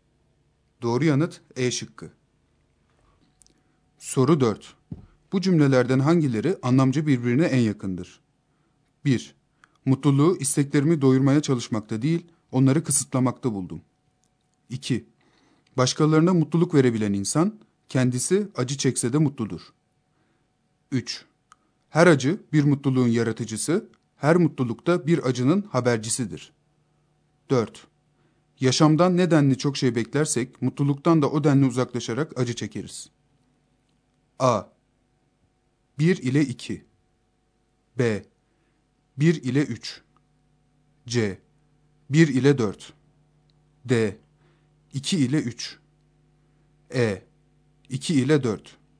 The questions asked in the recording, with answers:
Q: Bu cümlelerden hangileri anlamca birbirine en yakındır?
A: Doğru yanıt C şıkkı.